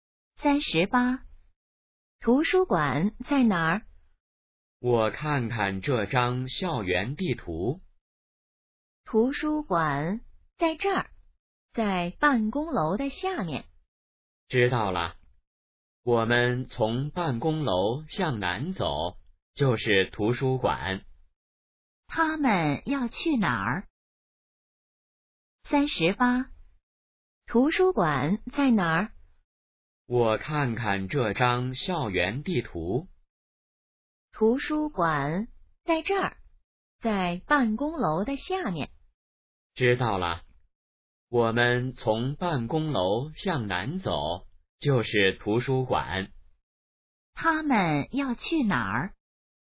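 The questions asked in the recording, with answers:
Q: 他们要去哪儿?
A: 图书馆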